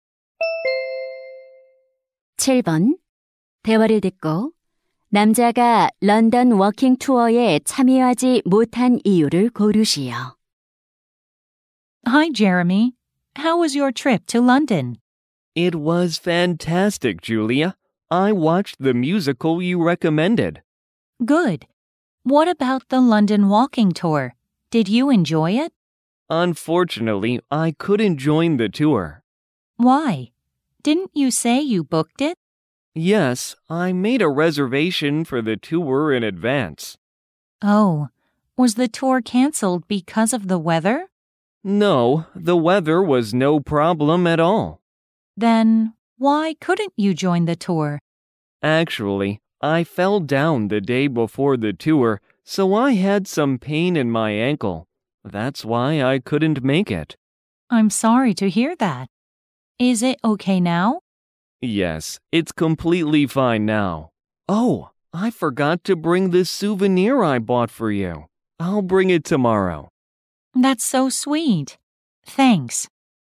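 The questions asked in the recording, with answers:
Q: 대화를 듣고 남자가 런던 워킹 투어에 참여하지 못한 이유를 고르시오.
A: 넘어져서 발목이 아팠기 때문에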